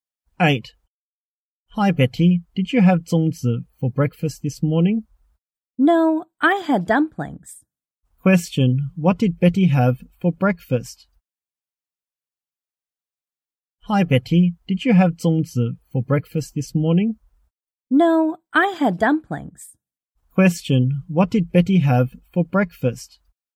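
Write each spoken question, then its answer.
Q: What did Betty have for breakfast?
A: Dumplings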